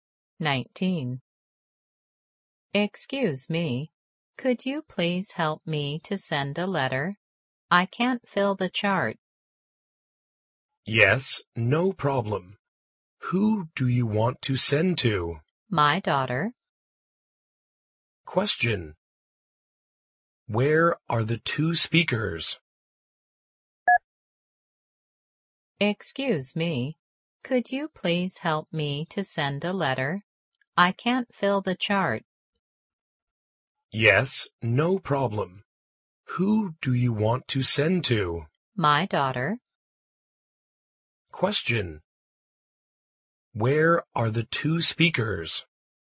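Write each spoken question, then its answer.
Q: Where are the two speakers?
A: At a post office.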